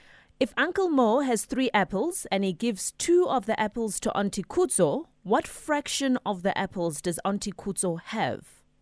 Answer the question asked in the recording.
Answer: the fraction of apples that Auntie Kutso has is 2/3.